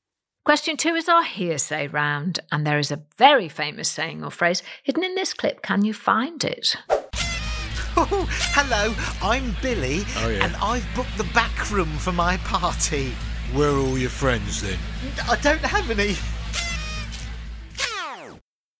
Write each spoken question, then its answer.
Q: there is a very famous saying or phrase hidden in this clip.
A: And the answer is Billy No Mates.